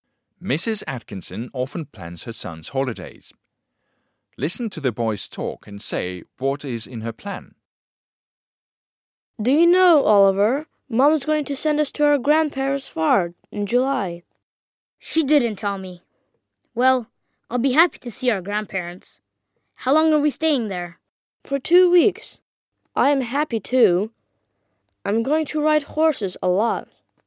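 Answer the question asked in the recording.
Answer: To send the boys to their grandparents' farm in July for 2 weeks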